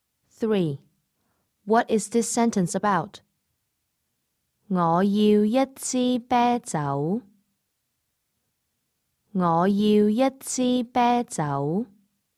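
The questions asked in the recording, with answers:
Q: What is this sentence about?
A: Asking for a beer (I want a bottle of beer)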